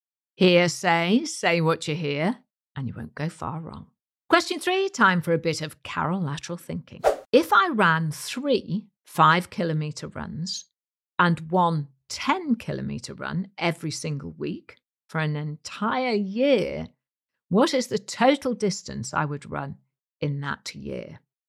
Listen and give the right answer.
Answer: And the answer is 1,300 kilometres